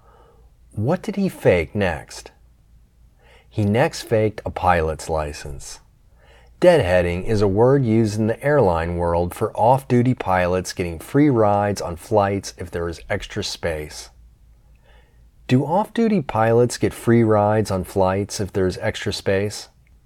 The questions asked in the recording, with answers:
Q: Do off-duty pilots get free rides on flights if there is extra space?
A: Yes, off-duty pilots get free rides on flights if there is extra space.